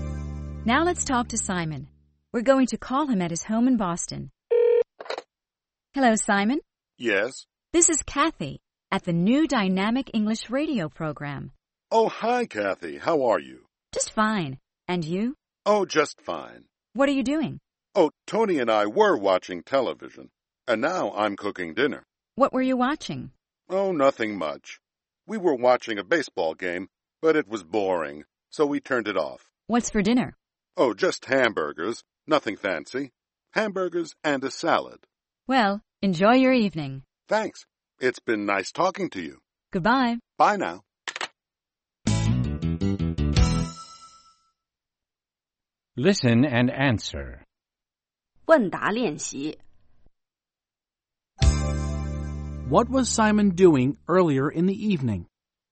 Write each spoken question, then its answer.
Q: What was Simon doing earlier in the evening?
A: He was watching television.